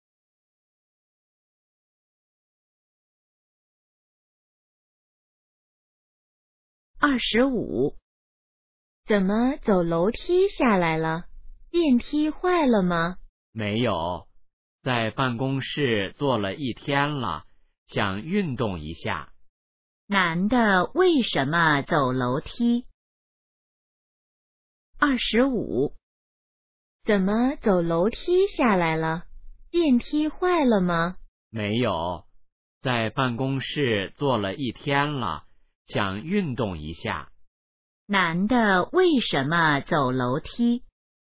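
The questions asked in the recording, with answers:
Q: 男的为什么走楼梯?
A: 想运动一下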